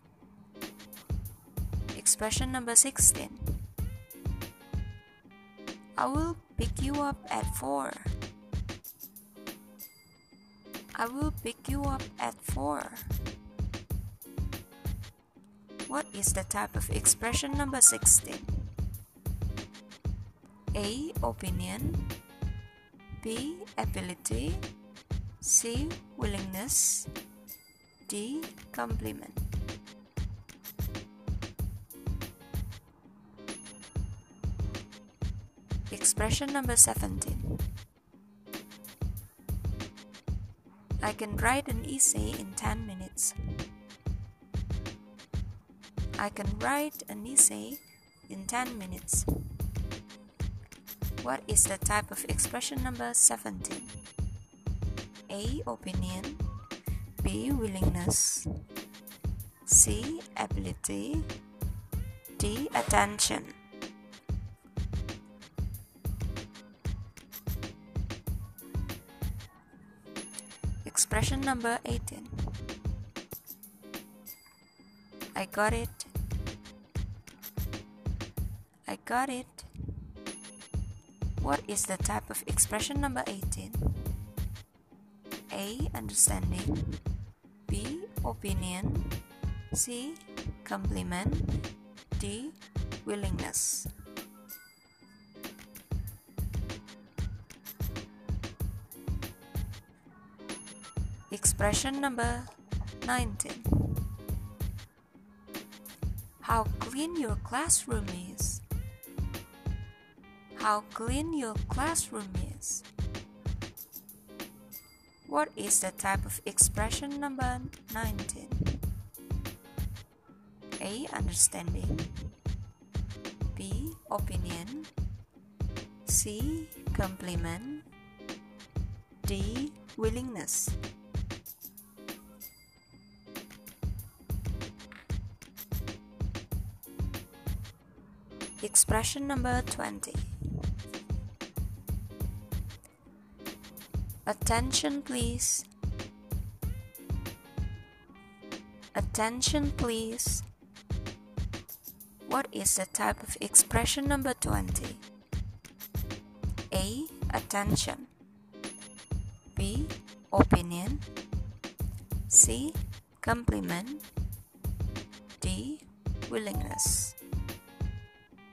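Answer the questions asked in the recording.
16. C: Willingness
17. C: Ability
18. A: Understanding
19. C: Compliment
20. A: Attention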